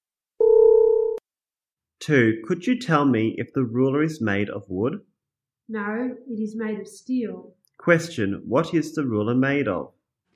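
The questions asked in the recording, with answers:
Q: Question, what is the ruler made of?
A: Steel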